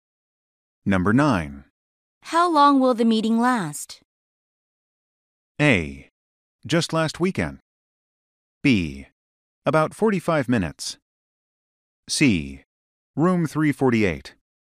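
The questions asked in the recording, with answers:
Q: How long will the meeting last?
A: B: About 45 minutes.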